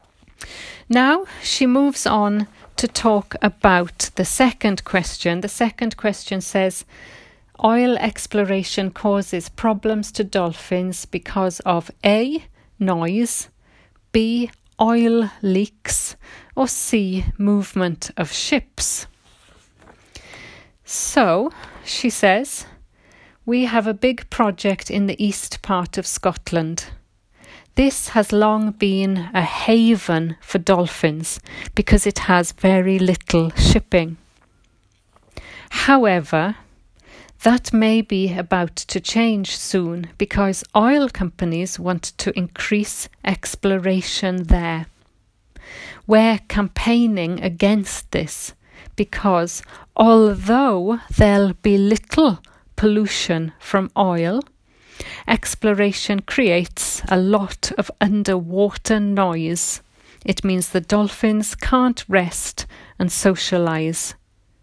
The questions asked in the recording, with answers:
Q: oil exploration causes problems to dolphins because of A, noise, B, oil leaks, or C, movement of ships.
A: So the answer 14 is A, noise.